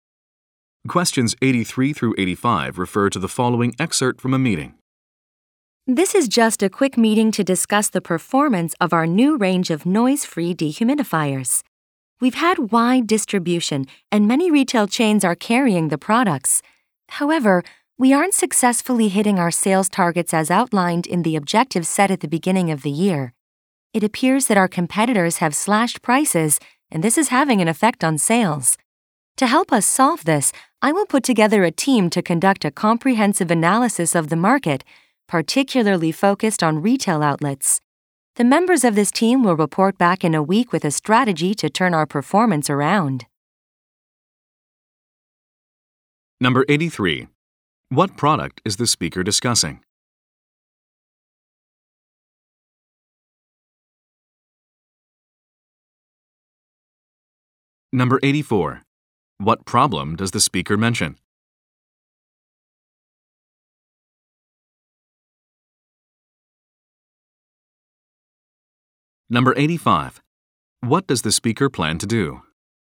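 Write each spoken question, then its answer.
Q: What product is the speaker discussing?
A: Noise-free dehumidifiers

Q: What problem does the speaker mention?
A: Sales targets are not being met because competitors cut prices

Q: What does the speaker plan to do?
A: Put together a team to analyze the market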